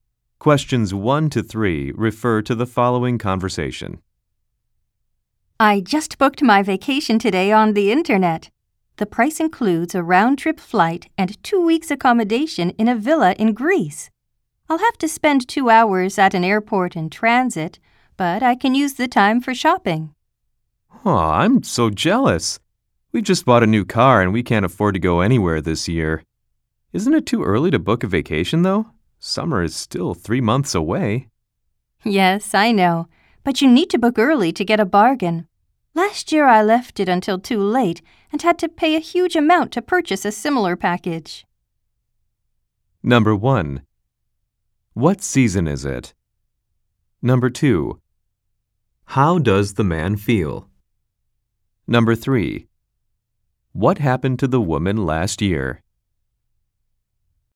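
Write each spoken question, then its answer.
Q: What season is it?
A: Spring

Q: How does the man feel?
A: Jealous

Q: What happened to the woman last year?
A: She booked too late and had to pay a huge amount for a similar package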